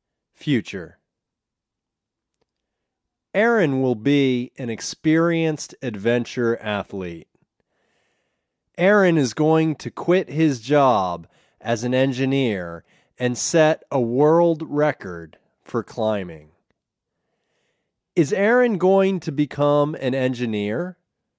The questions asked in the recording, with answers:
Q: Is Aaron going to become an engineer?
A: No, he's not going to become an engineer.